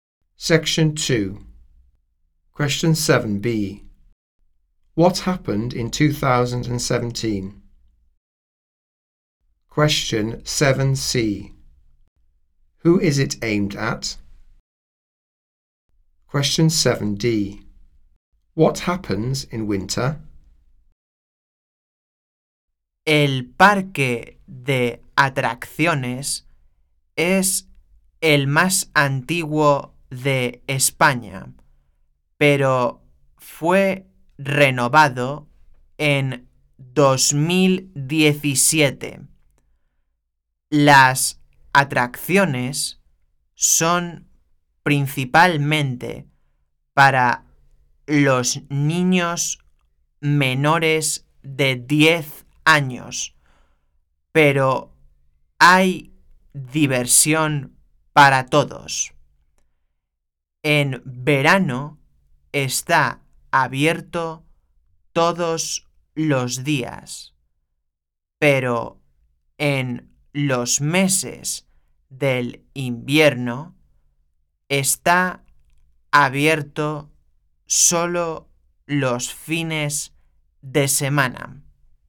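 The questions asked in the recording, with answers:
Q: What happened in 2017?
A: The park was renovated

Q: Who is it aimed at?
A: Children under 10

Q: What happens in winter?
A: It is open only at weekends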